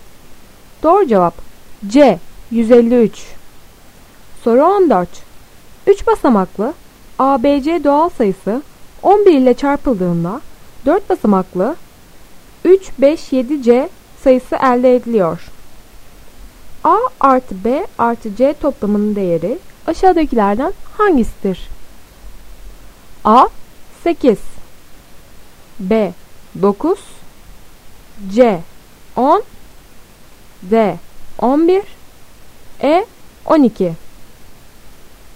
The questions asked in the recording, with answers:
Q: A artı B artı C toplamının değeri aşağıdakilerden hangisidir?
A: Doğru cevap C 10.